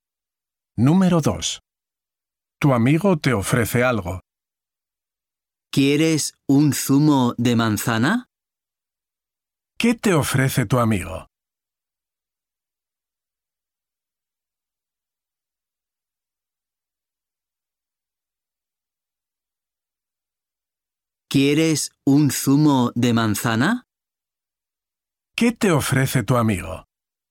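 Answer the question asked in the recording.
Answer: un zumo de manzana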